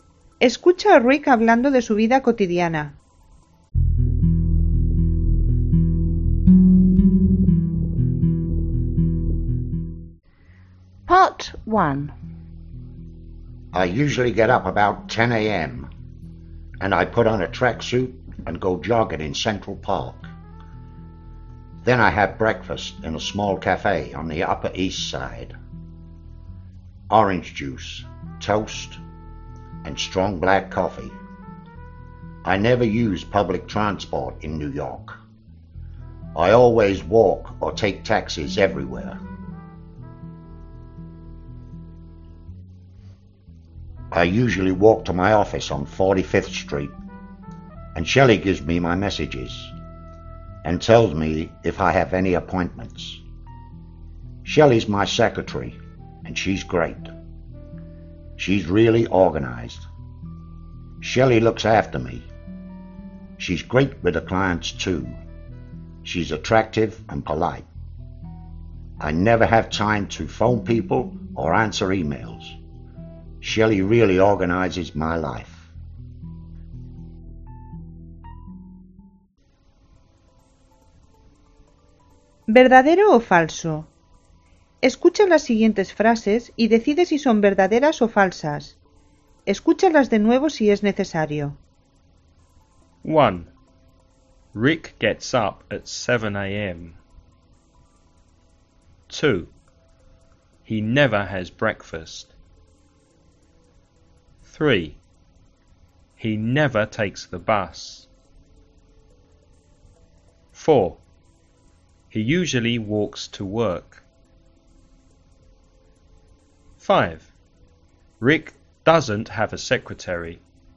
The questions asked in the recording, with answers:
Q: Rick gets up at 7 a.m.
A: False.

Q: He never has breakfast.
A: False. He has breakfast in a small cafe.

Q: He never takes the bus.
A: True. He never uses public transport.

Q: He usually walks to work.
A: True.

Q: Rick doesn't have a secretary.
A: False. Her name's Shelley.